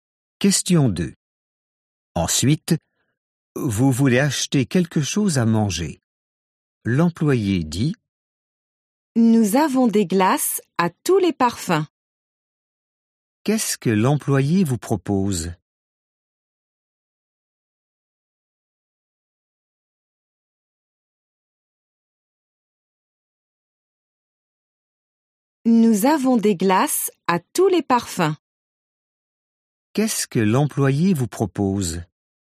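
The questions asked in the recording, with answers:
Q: Qu'est-ce que l'employé vous propose ?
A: Des glaces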